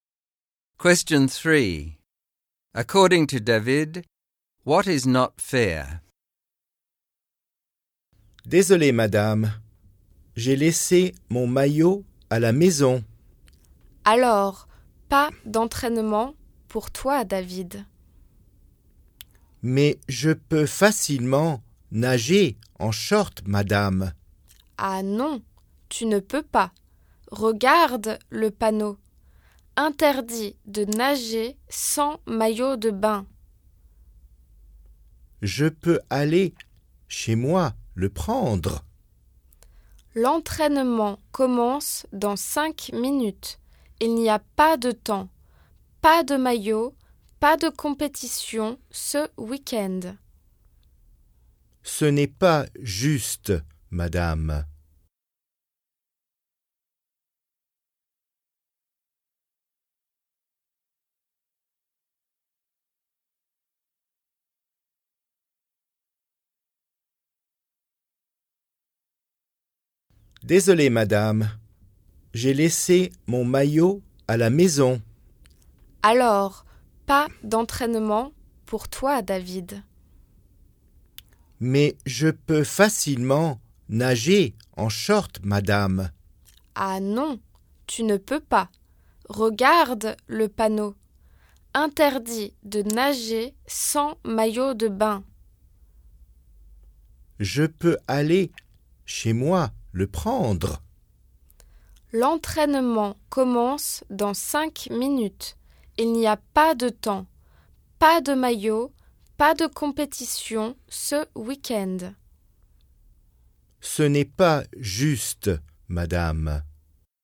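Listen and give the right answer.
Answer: That he can't train or compete this weekend because he forgot his swimsuit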